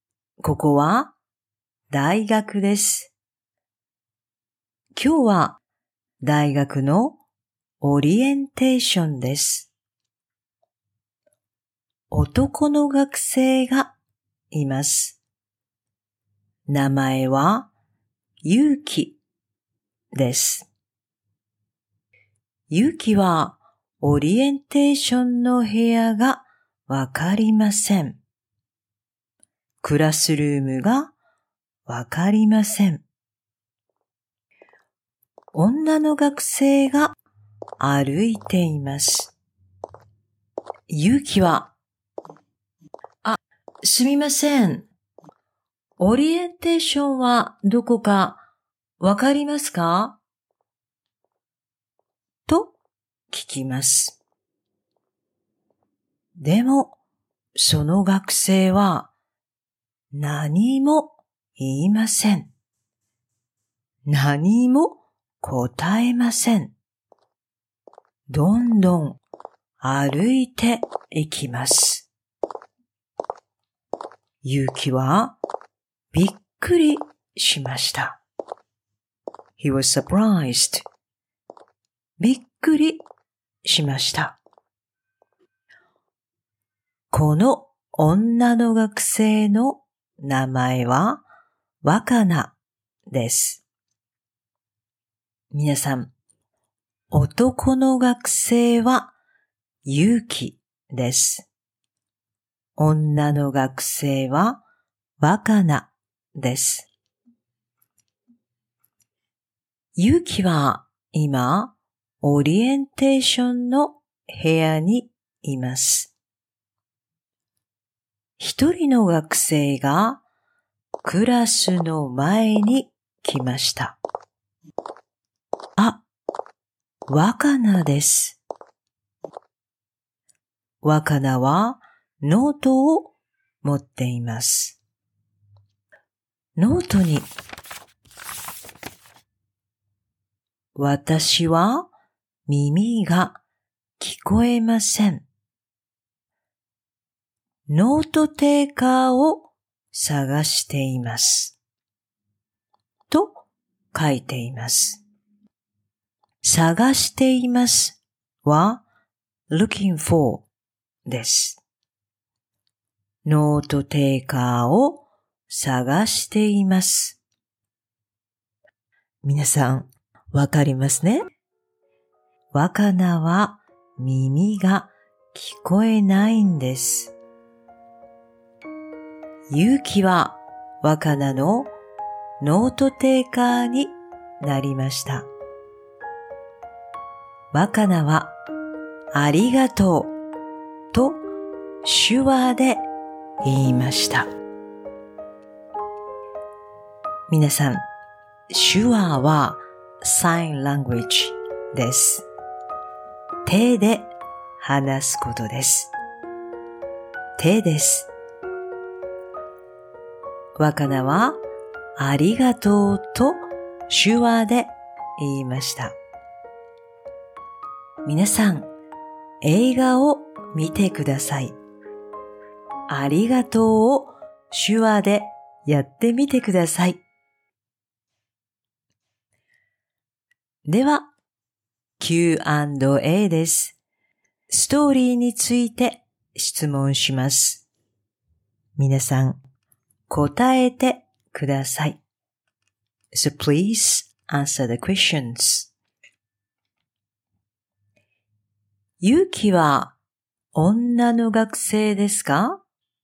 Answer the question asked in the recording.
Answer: いいえ、女の学生じゃありません。男の学生です。